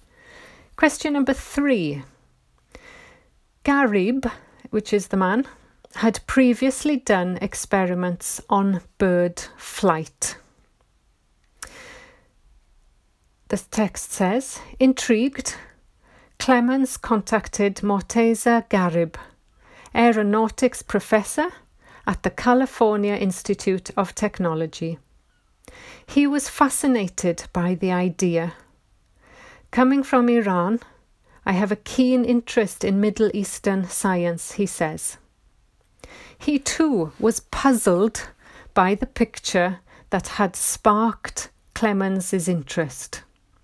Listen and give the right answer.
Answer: So the answer is not given.